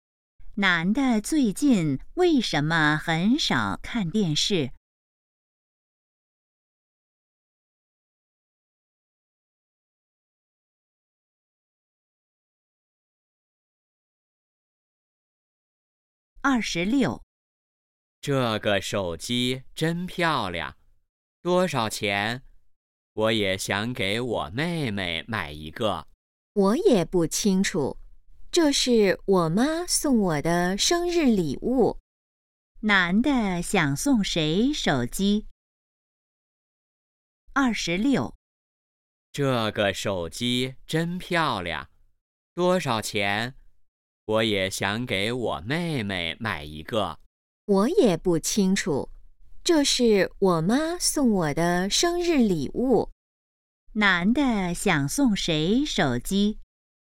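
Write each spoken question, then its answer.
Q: 男的想送谁手机?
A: 妹妹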